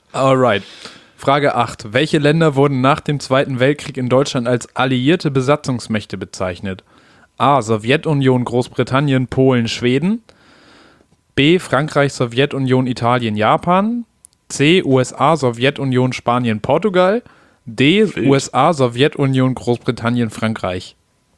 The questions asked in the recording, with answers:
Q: Welche Länder wurden nach dem Zweiten Weltkrieg in Deutschland als alliierte Besatzungsmächte bezeichnet?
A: D. D, ne?